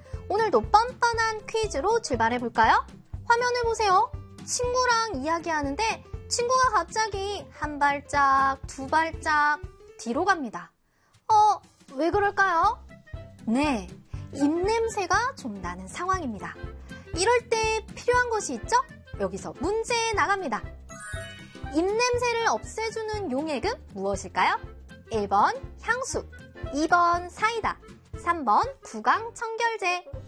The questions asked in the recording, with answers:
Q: 입냄새를 없애주는 용액은 무엇일까요? 1번 향수, 2번 사이다, 3번 구강청결제.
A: 정답 3번이죠?